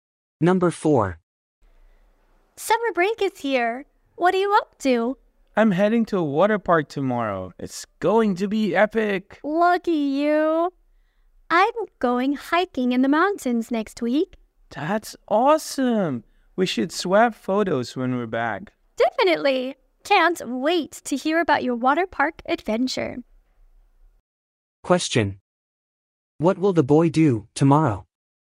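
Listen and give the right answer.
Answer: Go to a water park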